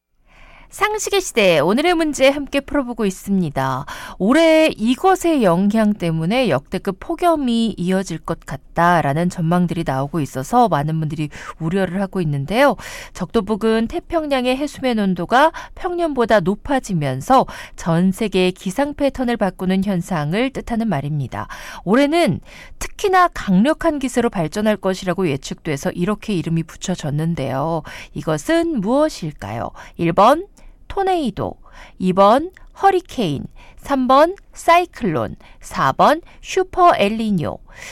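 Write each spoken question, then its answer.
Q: 이것은 무엇일까요?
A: 4: 슈퍼 엘니뇨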